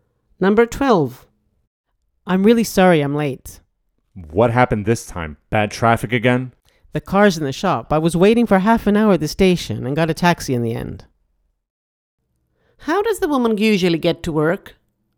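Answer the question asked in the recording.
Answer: by car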